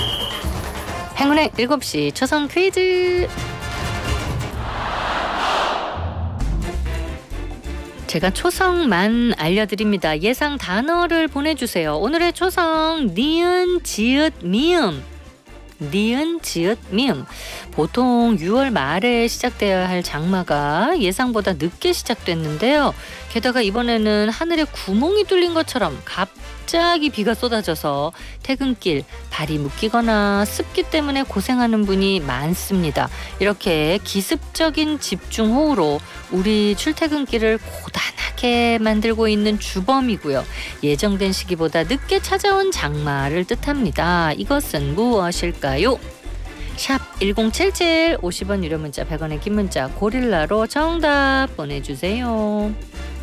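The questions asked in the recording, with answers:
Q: 이것은 무엇일까요?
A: 늦장마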